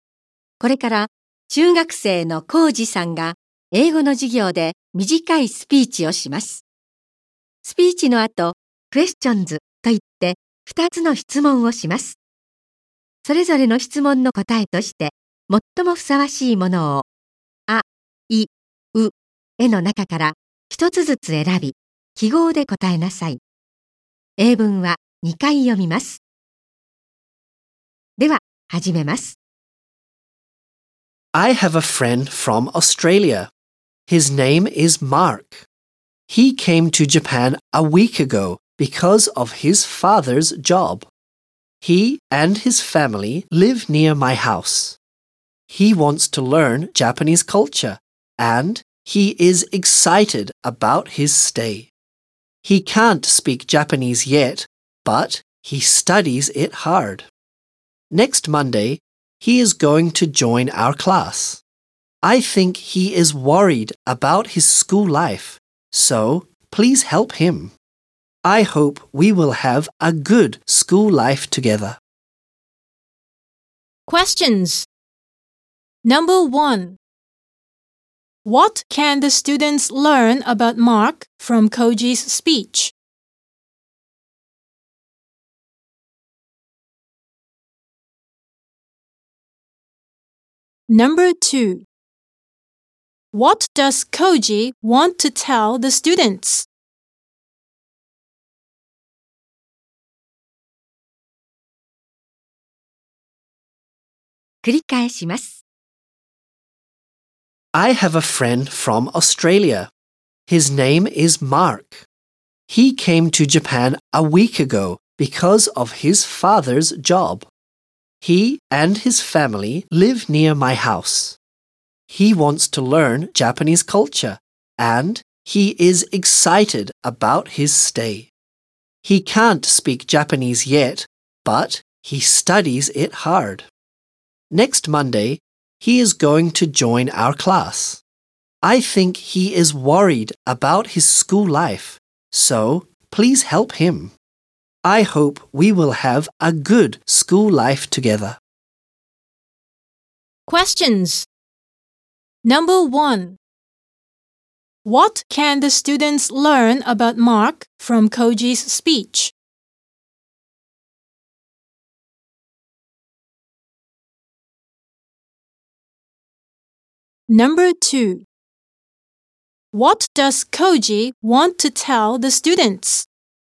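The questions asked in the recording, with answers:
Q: What does Koji want to tell the students?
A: He wants them to help Mark with his school life.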